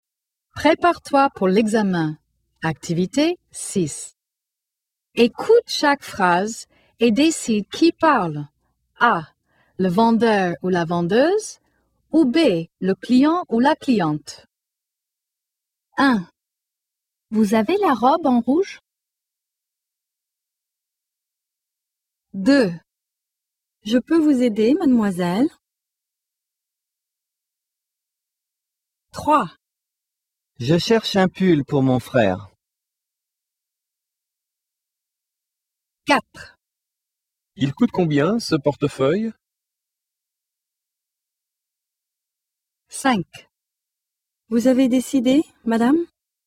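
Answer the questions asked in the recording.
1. B: Le client ou la cliente
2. A: Le vendeur ou la vendeuse
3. B: Le client ou la cliente
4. B: Le client ou la cliente
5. A: Le vendeur ou la vendeuse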